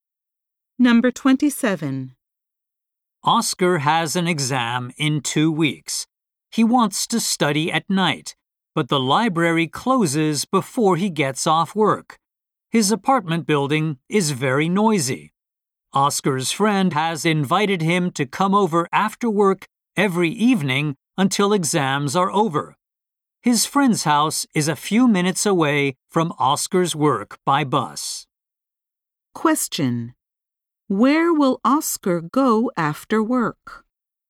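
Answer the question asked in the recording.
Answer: To his friend's house.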